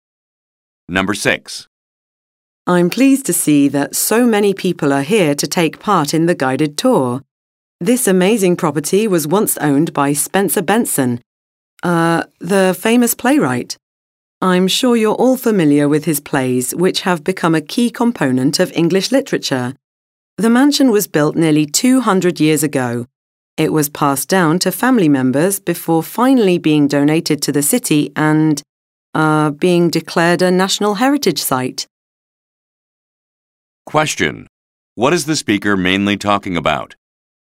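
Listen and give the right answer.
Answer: The history of a mansion once owned by playwright Spencer Benson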